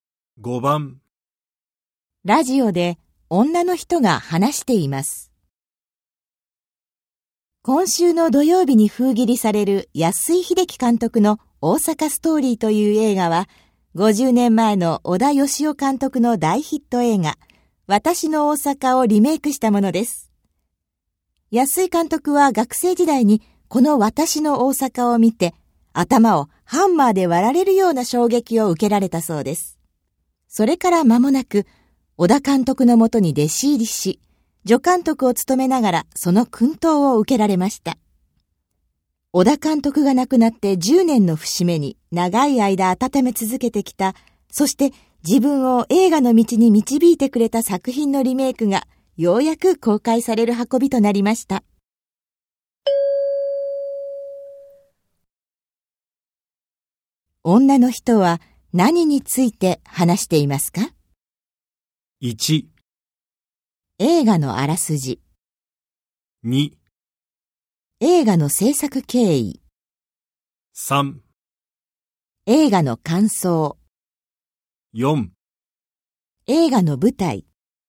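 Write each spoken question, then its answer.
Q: 女の人は何について話していますか?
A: 2: 映画の制作経緯。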